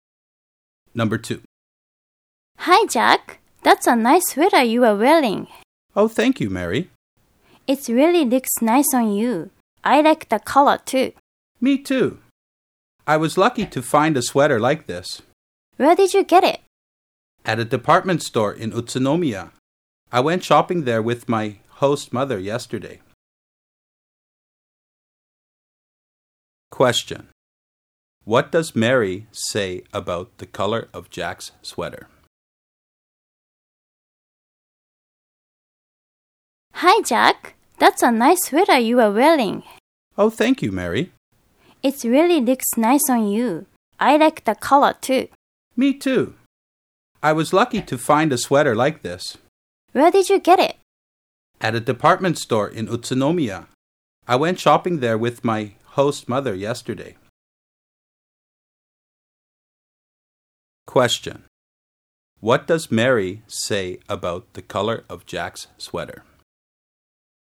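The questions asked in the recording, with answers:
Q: Question. What does Mary say about the color of Jack's sweater?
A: She likes it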